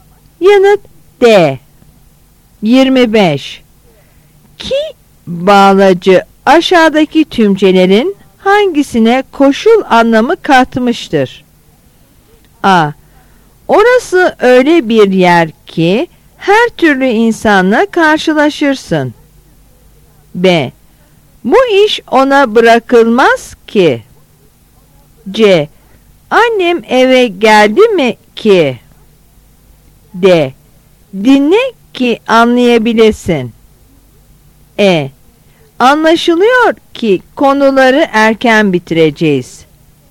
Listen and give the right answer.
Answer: Yanıt D.